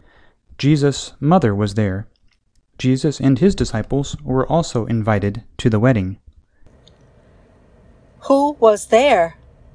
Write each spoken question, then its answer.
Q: Who was there?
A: Jesus, his mother, and his disciples were there.